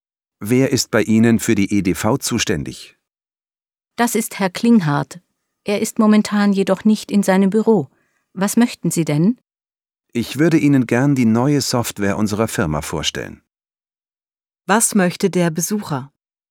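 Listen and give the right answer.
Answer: Die neue Software seiner Firma vorstellen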